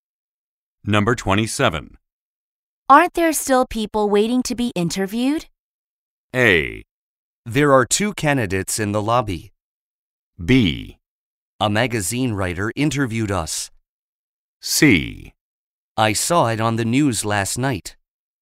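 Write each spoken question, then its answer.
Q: Aren't there still people waiting to be interviewed?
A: A: There are two candidates in the lobby.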